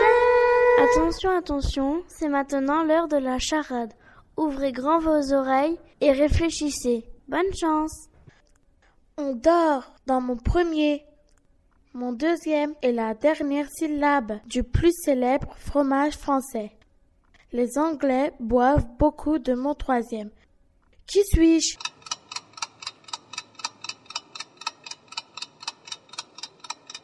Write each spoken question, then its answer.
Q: Qui suis-je?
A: Oui, oui, oui, je sais, c'est liberté.